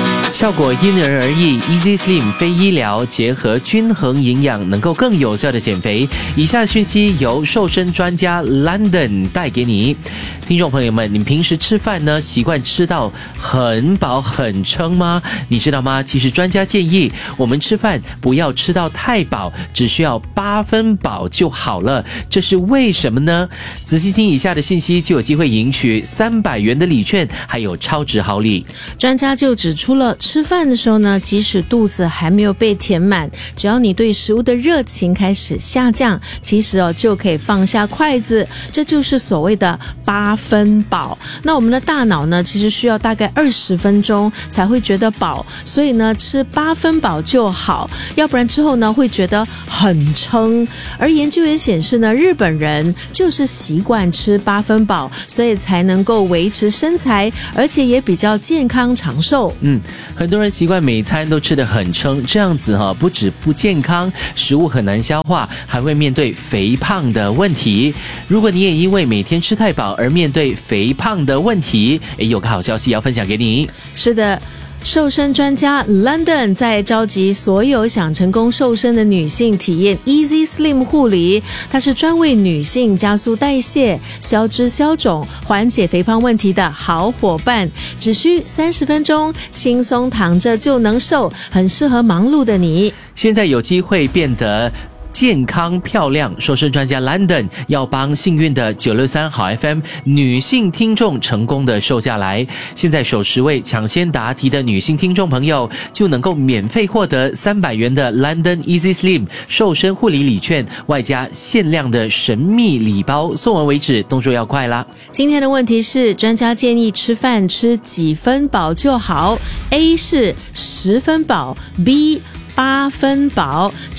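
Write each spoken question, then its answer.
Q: 专家建议吃饭吃几分饱就好, A 是10分饱, B 八分饱。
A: B: 八分饱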